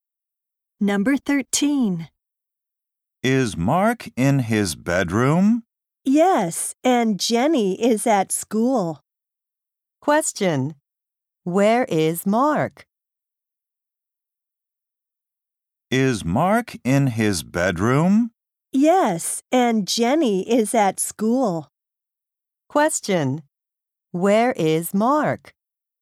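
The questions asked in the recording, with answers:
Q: Where is Mark?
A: In his bedroom.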